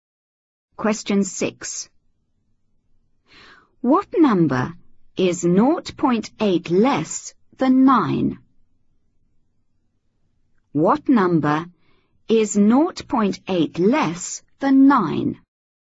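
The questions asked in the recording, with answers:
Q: What number is 0.8 less than 9?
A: 8.2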